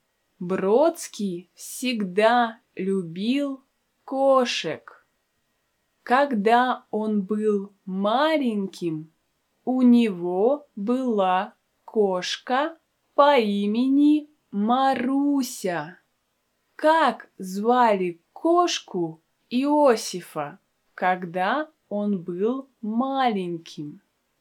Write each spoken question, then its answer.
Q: Как звали кошку Иосифа, когда он был маленьким?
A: Правильно, ее звали Маруся.